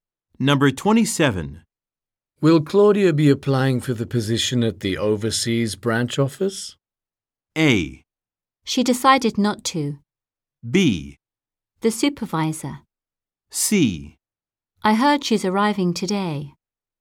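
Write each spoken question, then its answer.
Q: Will Claudia be applying for the position at the overseas branch office?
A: A: She decided not to.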